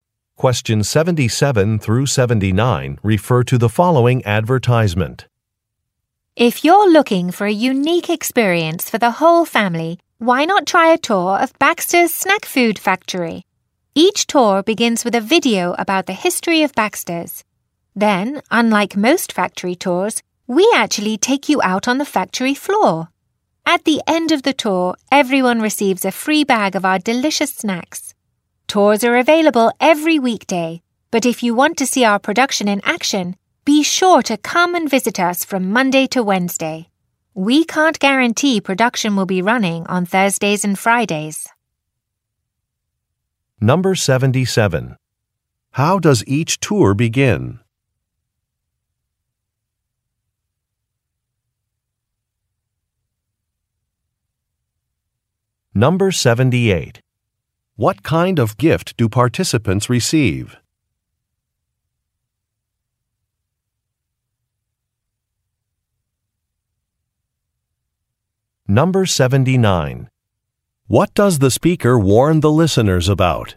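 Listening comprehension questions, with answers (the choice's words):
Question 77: How does each tour begin?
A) Refreshments are served.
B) Safety equipment is explained.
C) A video is shown.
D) Maps are distributed.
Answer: A video is shown.

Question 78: What kind of gift do participants receive?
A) A discount coupon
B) A bag of snacks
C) A T-shirt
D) A postcard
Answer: A bag of snacks

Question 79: What does the speaker warn the listeners about?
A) How to pay for food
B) What clothes to wear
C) Where to park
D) Which days to visit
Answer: Which days to visit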